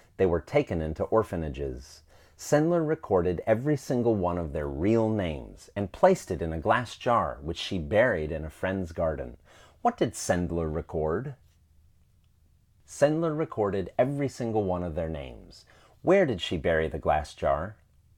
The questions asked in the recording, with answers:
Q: Where did she bury the glass jar?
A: She buried the glass jar in a friend's garden.